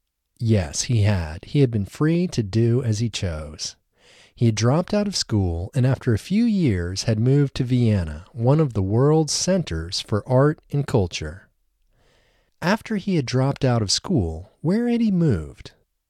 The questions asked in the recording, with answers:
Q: After he had dropped out of school, where had he moved?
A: After he had dropped out of school, he had moved to Vienna, one of the world's centers for art and culture.